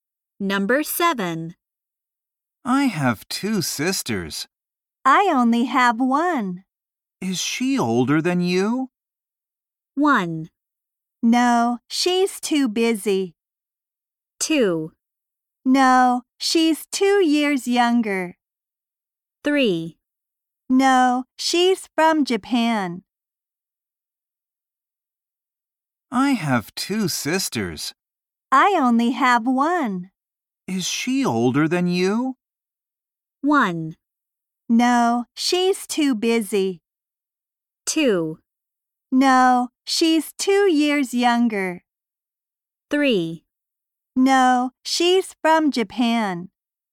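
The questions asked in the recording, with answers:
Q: Is she older than you?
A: 2: No, she's 2 years younger.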